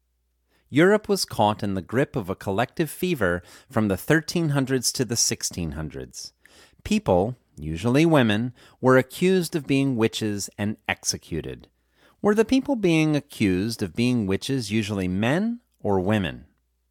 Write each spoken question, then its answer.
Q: Were the people being accused of being witches usually men or women?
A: The people being accused of being witches were usually women.